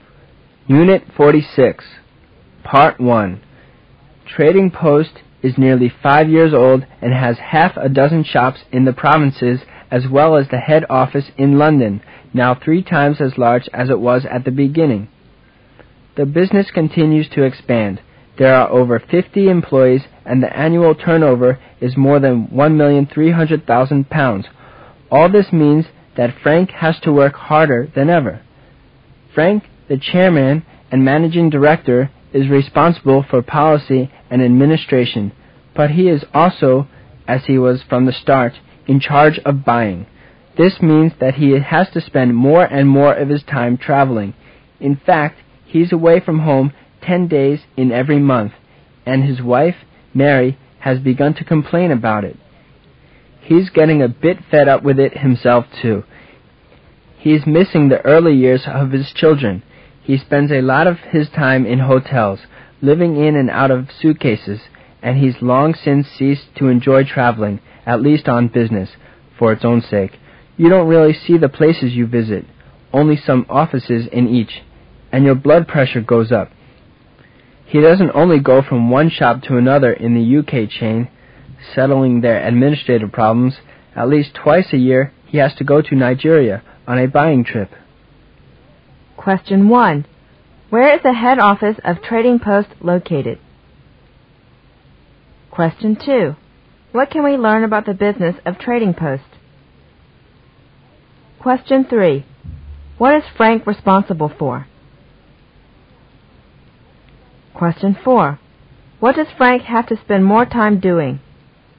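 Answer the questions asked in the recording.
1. London
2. It continues to expand
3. Policy, administration and buying
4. Traveling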